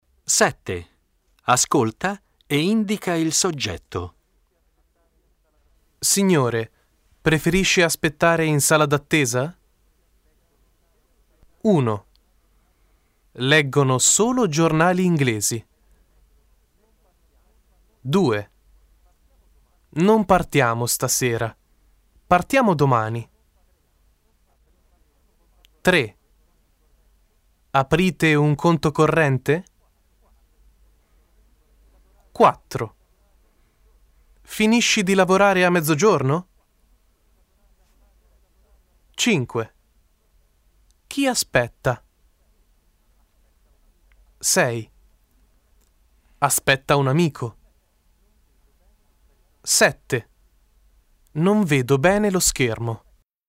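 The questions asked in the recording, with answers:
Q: Leggono solo giornali inglesi.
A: loro

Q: Non partiamo stasera. Partiamo domani.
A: noi

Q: Aprite un conto corrente?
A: voi

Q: Finisci di lavorare a mezzogiorno?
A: tu

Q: Non vedo bene lo schermo.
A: io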